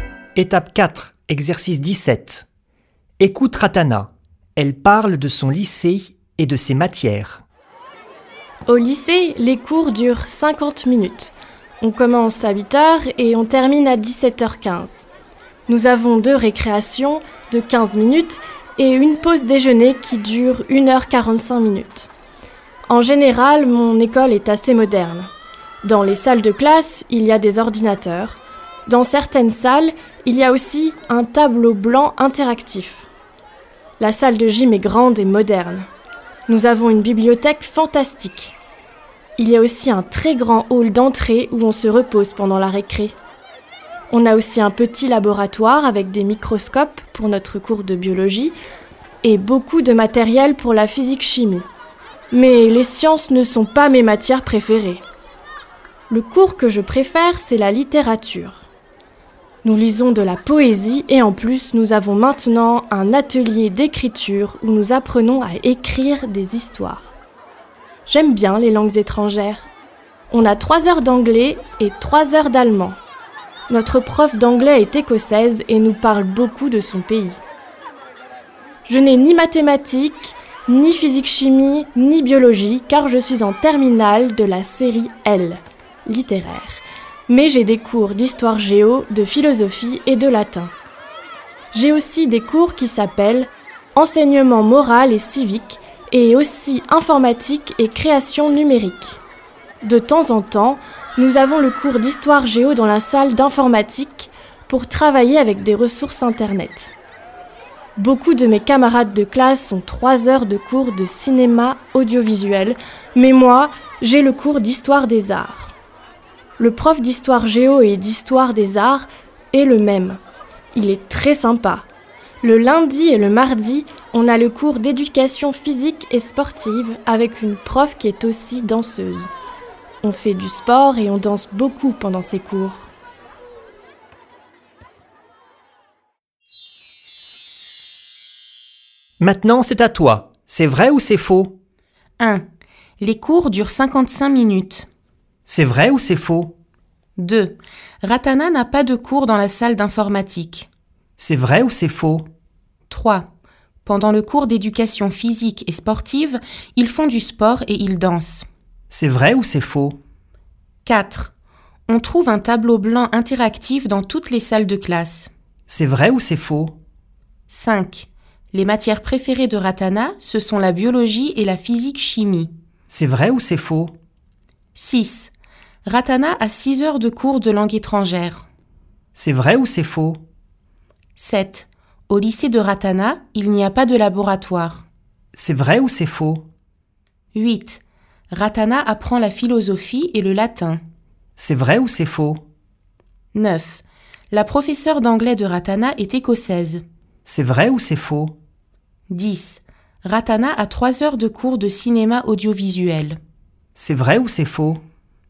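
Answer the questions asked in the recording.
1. faux
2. faux
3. vrai
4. faux
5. faux
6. vrai
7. faux
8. vrai
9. vrai
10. faux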